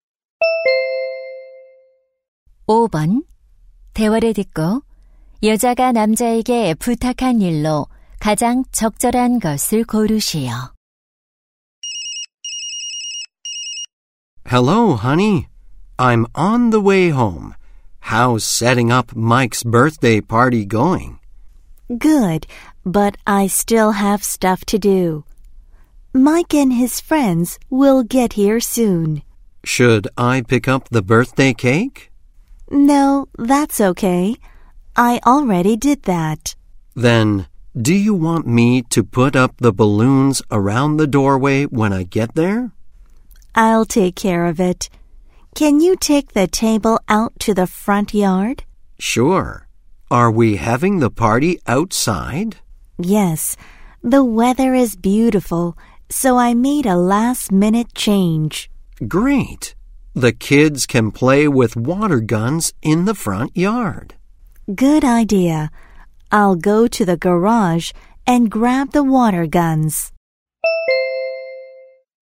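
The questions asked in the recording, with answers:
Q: 대화를 듣고 여자가 남자에게 부탁한 일로 가장 적절한 것을 고르시오.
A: 테이블을 앞마당으로 옮기기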